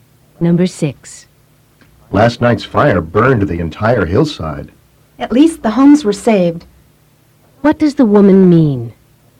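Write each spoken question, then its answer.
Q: What does the woman mean?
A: The homes were not burned.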